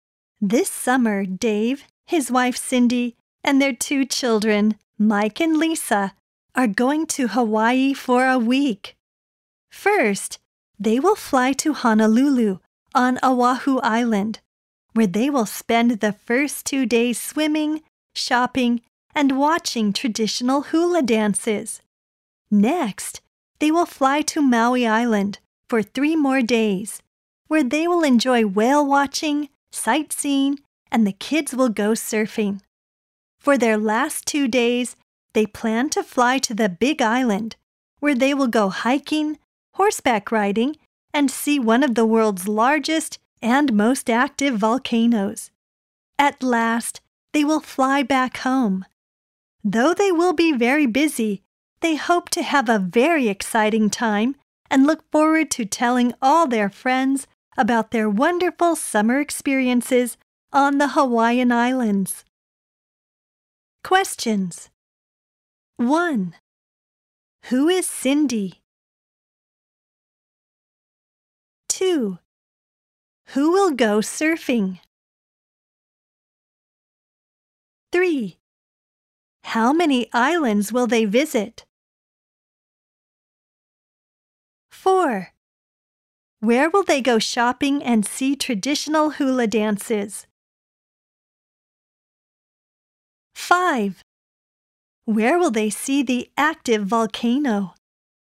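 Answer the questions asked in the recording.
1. Dave's wife
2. The kids, Mike and Lisa
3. Three
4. Honolulu on Oahu Island
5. The Big Island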